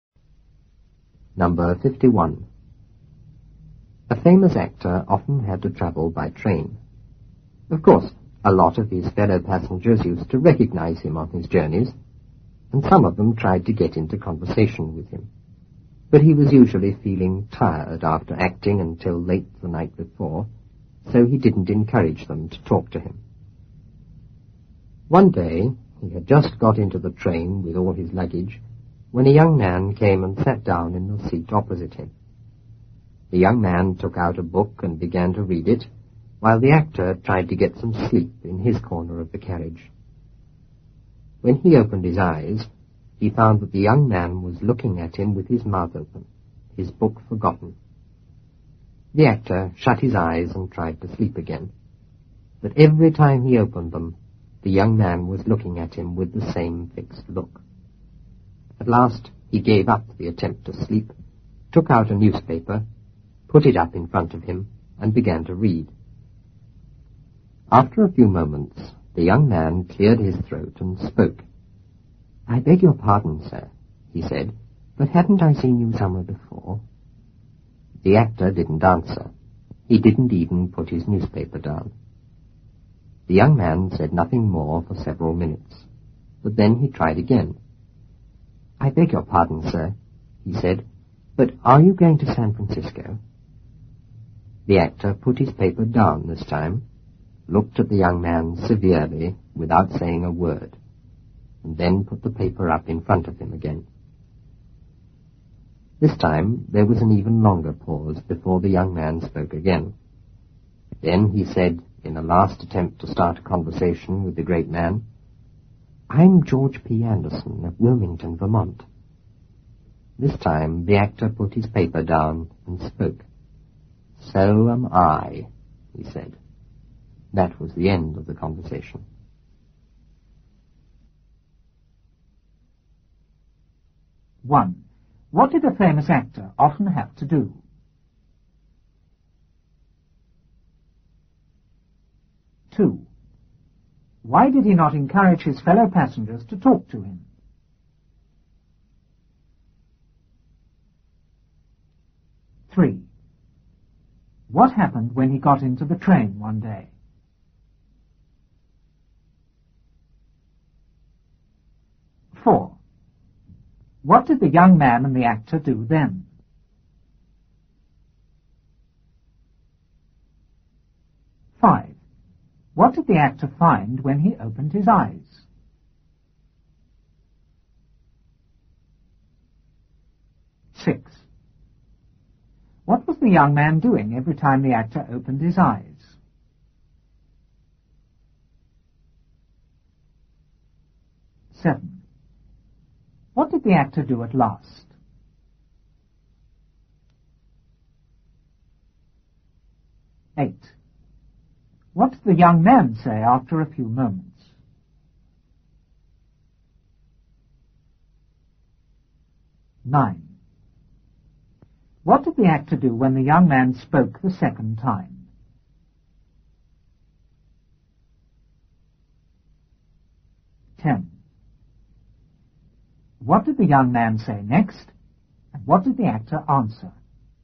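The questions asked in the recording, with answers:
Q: What did a famous actor often have to do?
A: Travel by train.

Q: Why did he not encourage his fellow passengers to talk to him?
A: He was usually tired after acting until late the night before.

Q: What happened when he got into the train one day?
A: A young man came and sat down in the seat opposite him.

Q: What did the young man and the actor do then?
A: The young man read a book; the actor tried to sleep.

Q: What did the actor find when he opened his eyes?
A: The young man was looking at him with his mouth open, his book forgotten.

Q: What was the young man doing every time the actor opened his eyes?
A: Looking at him with the same fixed look.

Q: What did the actor do at last?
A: He gave up trying to sleep, took out a newspaper, put it up in front of him and read.

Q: What did the young man say after a few moments?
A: "I beg your pardon, sir, but haven't I seen you somewhere before?"

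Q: What did the actor do when the young man spoke the second time?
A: He put his paper down, looked at him severely without a word, and put the paper up again.

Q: What did the young man say next, and what did the actor answer?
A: "I'm George P. Anderson of Wilmington, Vermont." The actor said, "So am I."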